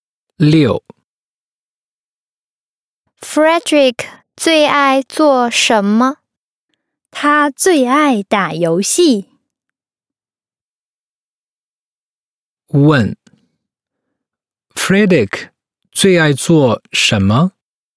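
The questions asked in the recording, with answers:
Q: Frederick 最爱做什么?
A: 打游戏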